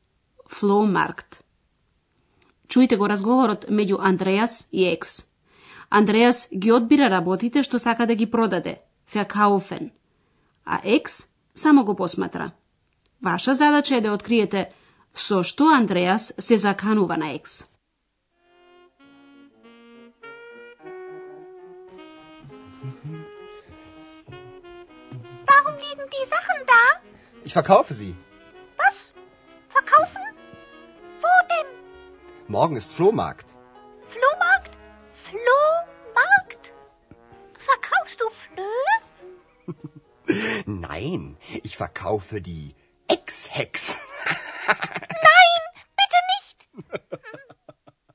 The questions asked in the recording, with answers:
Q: Ваша задача е да откриете со што Андреас се заканува на Екс.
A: Andreas ist се заканува на екс дека ќе ја продаде како и неговите се разбира дека тоа го кажува на шега.